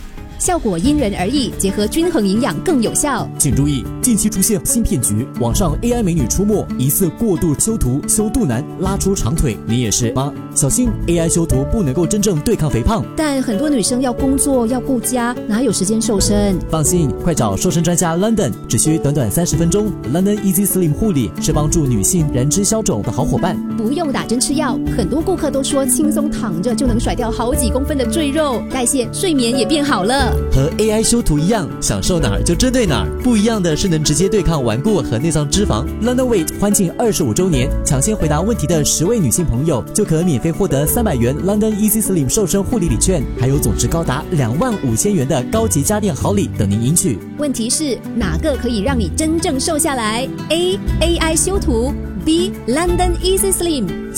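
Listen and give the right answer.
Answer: B: London Easy Slim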